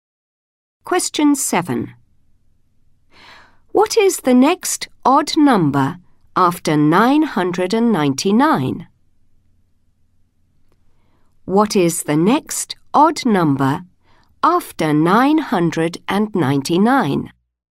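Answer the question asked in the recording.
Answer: 1001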